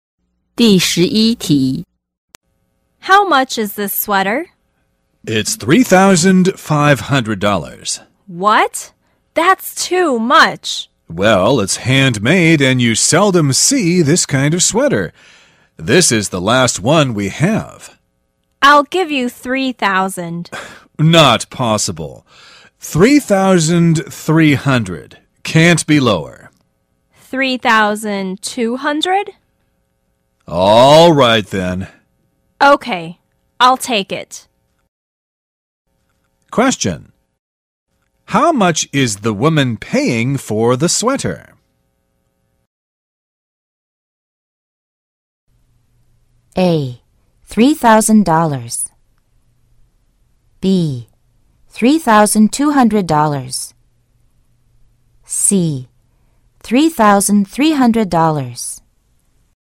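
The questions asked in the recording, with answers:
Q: How much is the woman paying for the sweater?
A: B: $3,200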